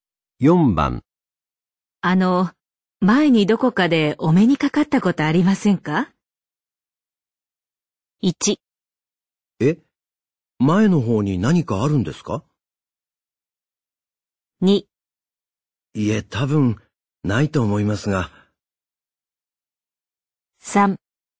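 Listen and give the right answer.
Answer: 2: いえ、多分、ないと思いますが。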